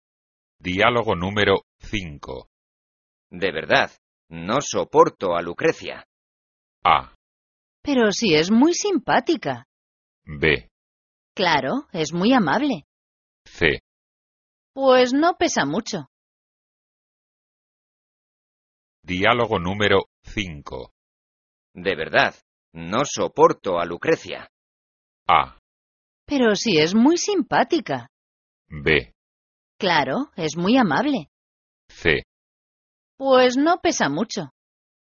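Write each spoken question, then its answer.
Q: De verdad, no soporto a Lucrecia.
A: A: Pero si es muy simpática.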